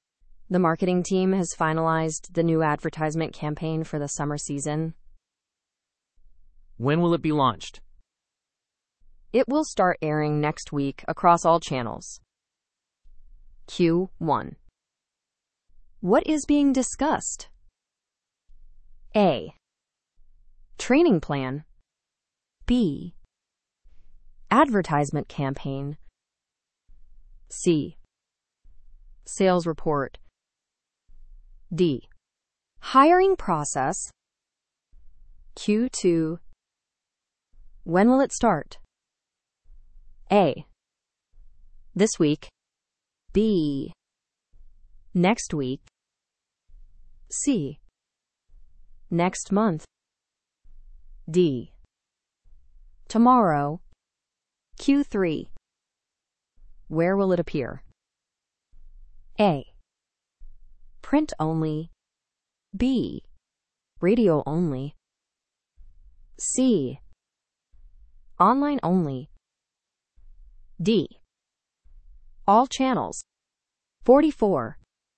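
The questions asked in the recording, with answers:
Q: What is being discussed?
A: B: Advertisement campaign.

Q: When will it start?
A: B: Next week.

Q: Where will it appear?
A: D: All channels.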